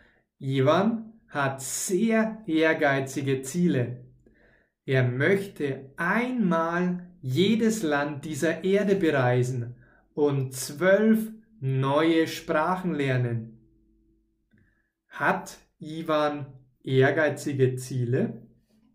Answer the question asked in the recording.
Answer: Ja, Ivan hat sehr ehrgeizige Ziele.